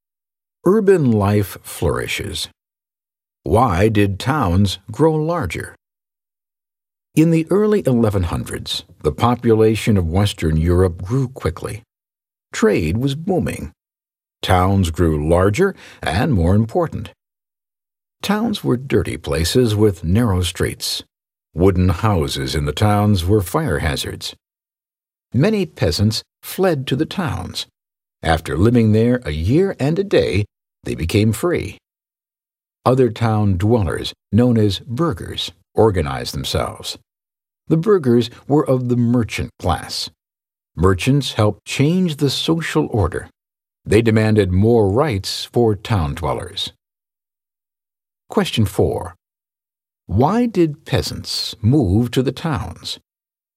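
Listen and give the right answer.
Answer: After living in a town for a year and a day, they became free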